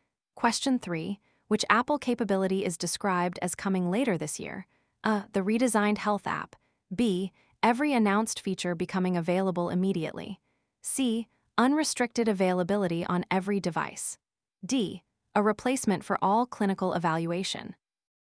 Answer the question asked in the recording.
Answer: The answer is A.